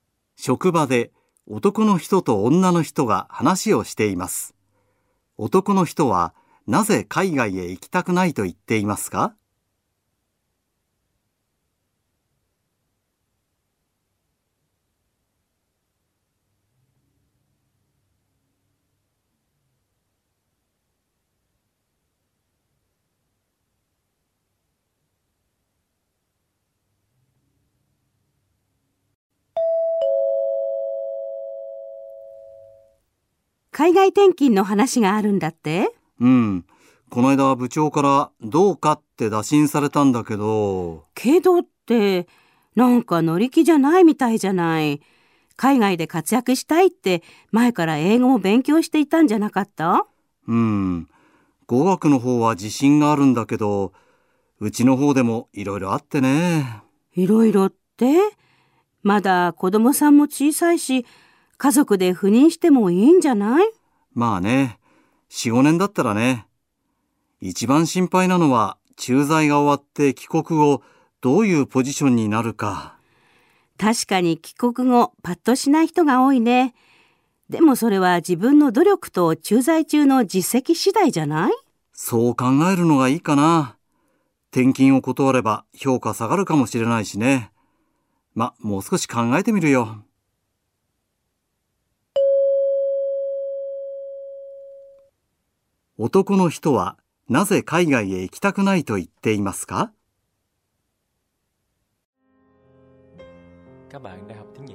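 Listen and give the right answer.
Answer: 帰国後どういうポジションになるかが心配だから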